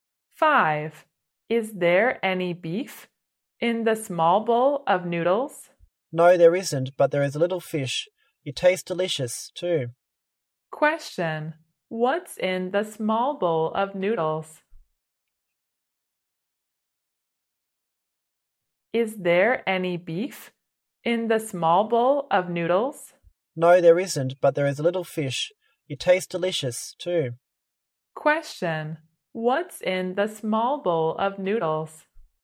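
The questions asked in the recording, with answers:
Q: What's in the small bowl of noodles?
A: A little fish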